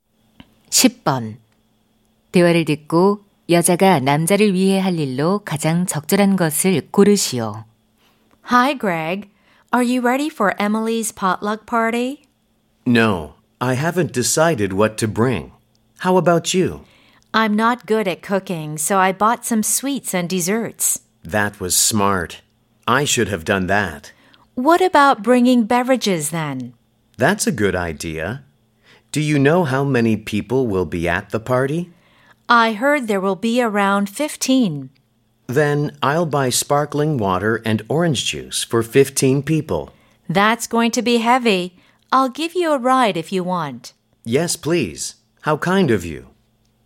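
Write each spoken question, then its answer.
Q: 대화를 듣고 여자가 남자를 위해 할 일로 가장 적절한 것을 고르시오.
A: 차로 태워다 주기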